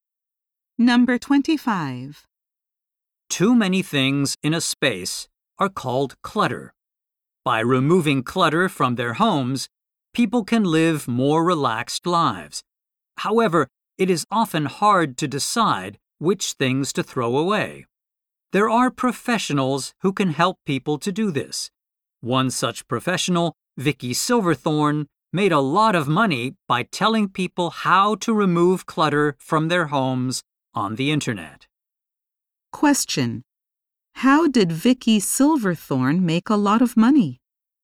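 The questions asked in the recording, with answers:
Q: How did Vicky Silverthorne make a lot of money?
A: By telling people on the internet how to remove clutter from their homes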